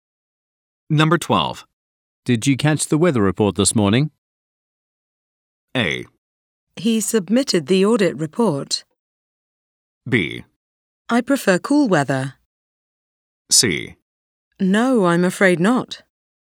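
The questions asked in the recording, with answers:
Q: Did you catch the weather report this morning?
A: C: No, I'm afraid not.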